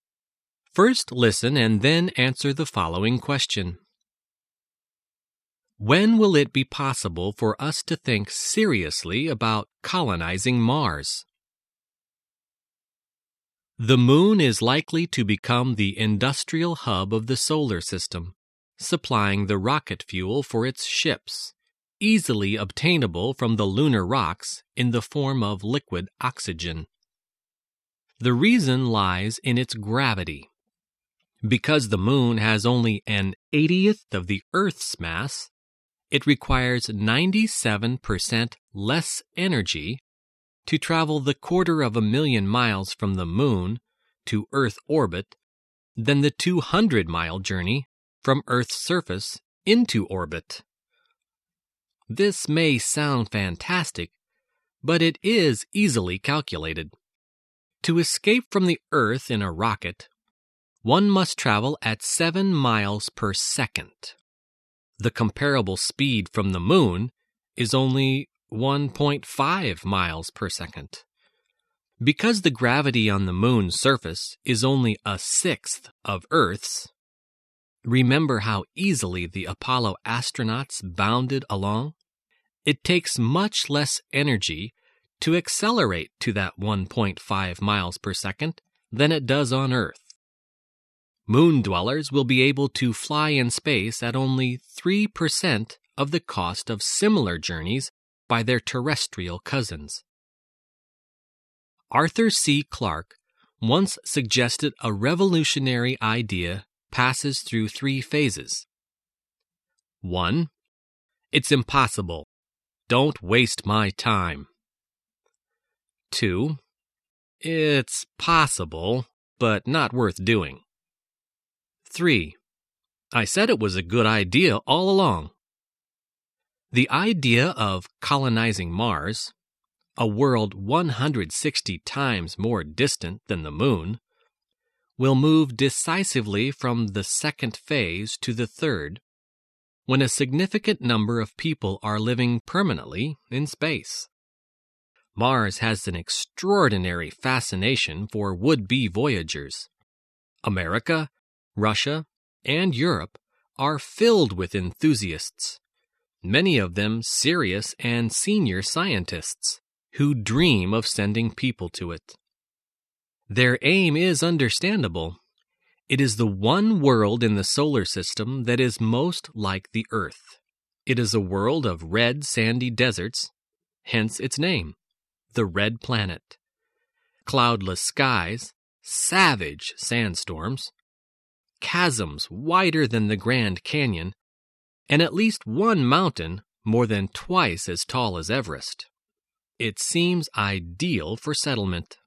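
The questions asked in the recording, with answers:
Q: When will it be possible for us to think seriously about colonizing Mars?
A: When a significant number of people are living permanently in space.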